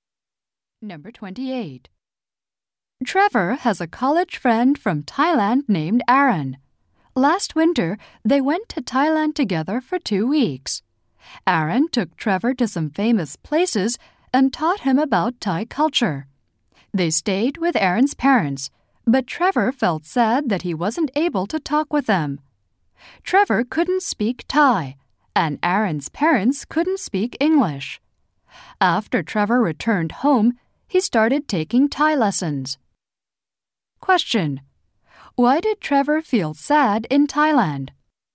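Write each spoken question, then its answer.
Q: Why did Trevor feel sad in Thailand?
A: He couldn't talk with Aaron's parents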